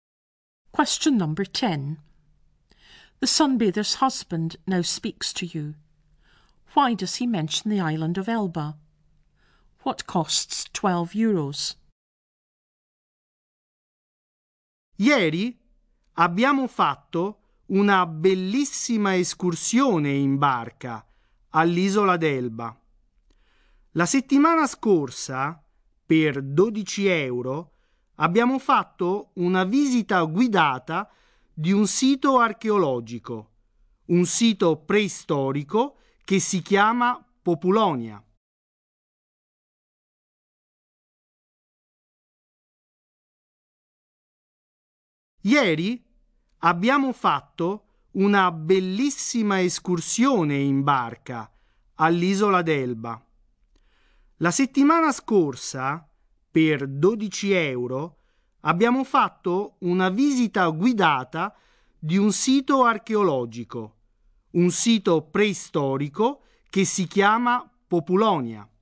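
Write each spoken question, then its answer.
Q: Why does he mention the island of Elba?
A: They went on a boat trip there yesterday

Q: What costs 12 euros?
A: A guided visit to a prehistoric archaeological site (Populonia)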